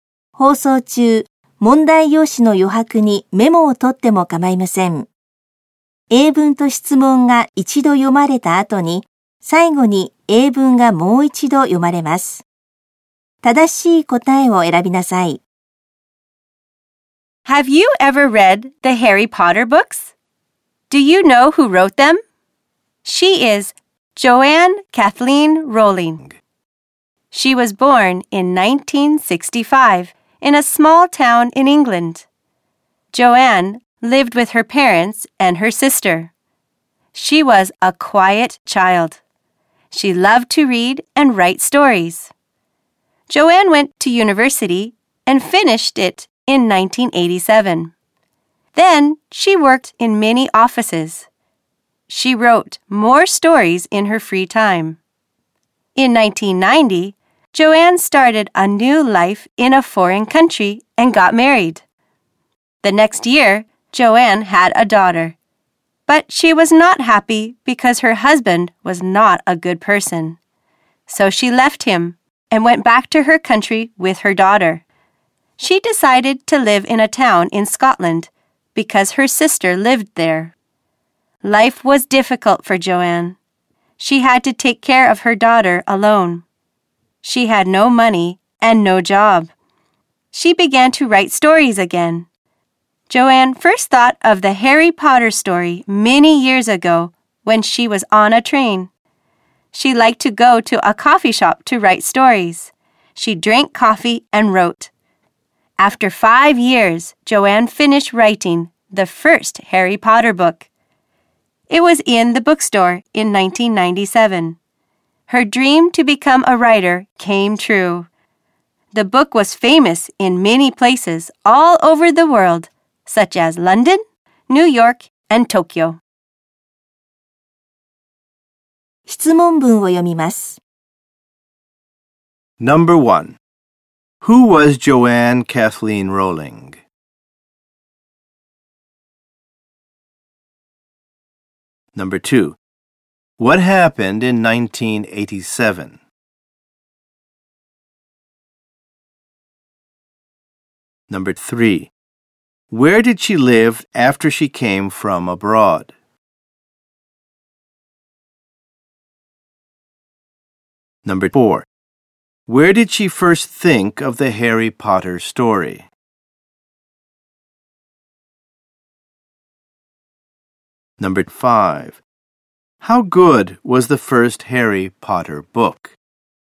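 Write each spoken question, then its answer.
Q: Who was Joanne Kathleen Rowling?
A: The writer of the Harry Potter books

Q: What happened in 1987?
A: She finished university

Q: Where did she live after she came from abroad?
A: In a town in Scotland

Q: Where did she first think of the Harry Potter story?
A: On a train

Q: How good was the first Harry Potter book?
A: It was famous all over the world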